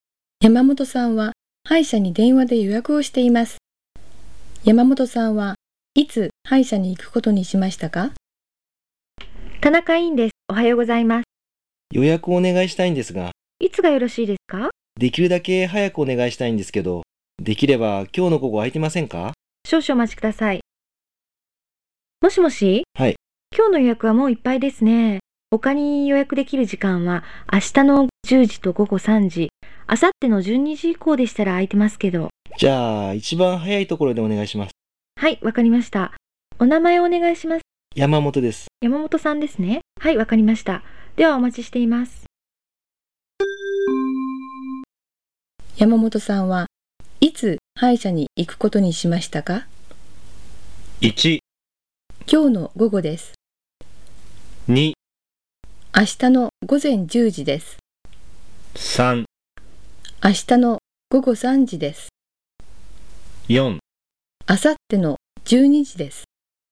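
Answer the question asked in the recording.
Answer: 2: 明日の午前10時です。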